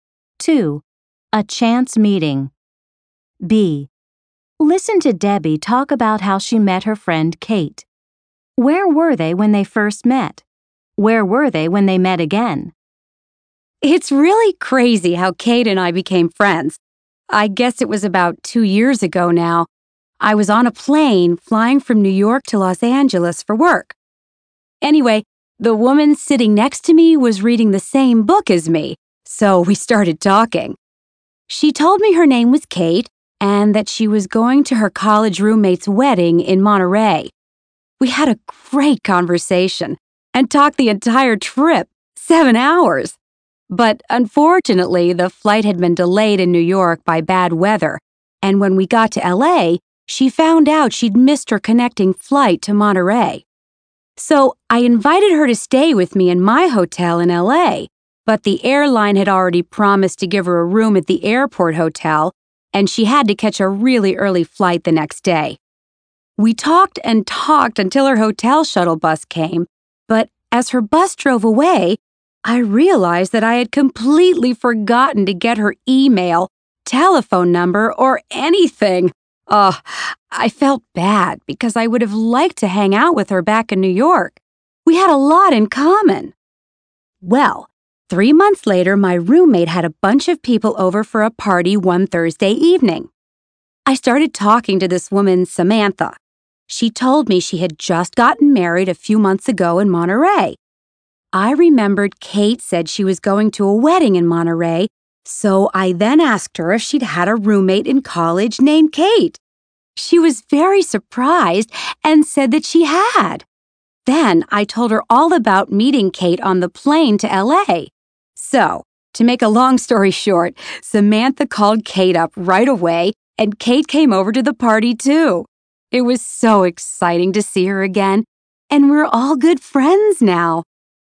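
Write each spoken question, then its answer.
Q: Where were they when they first met?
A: On a plane from New York to Los Angeles

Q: Where were they when they met again?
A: At a party at Debbie's place (her roommate's party)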